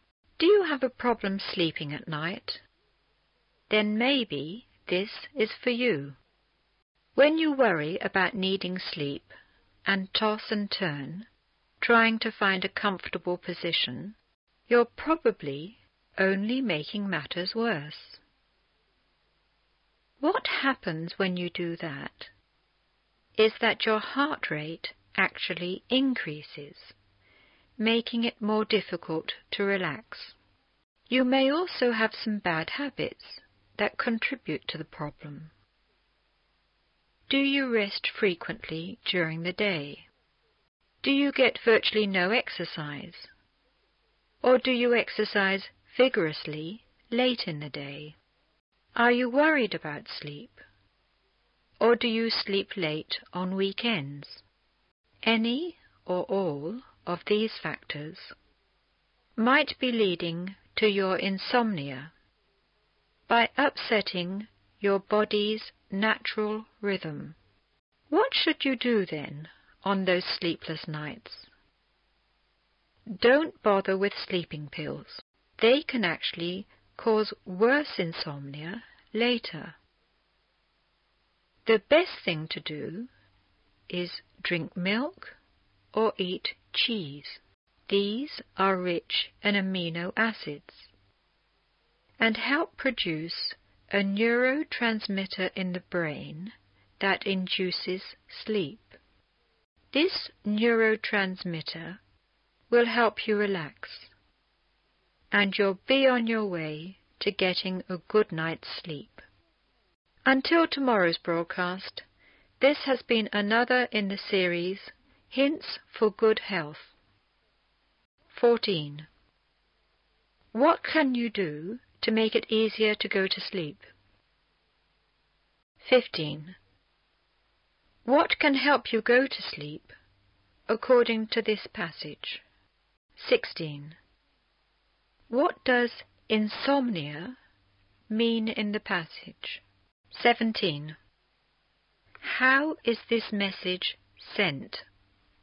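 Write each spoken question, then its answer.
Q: What can help you go to sleep according to this passage?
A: Drinking milk or eating cheese

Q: What does insomnia mean in the passage?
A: Having trouble sleeping at night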